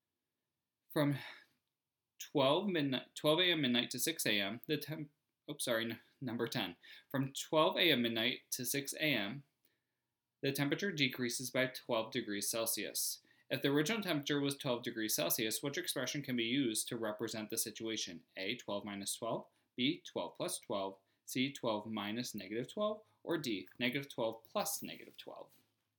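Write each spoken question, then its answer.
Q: If the original temperature was 12 degrees Celsius, which expression can be used to represent the situation?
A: A: 12 minus 12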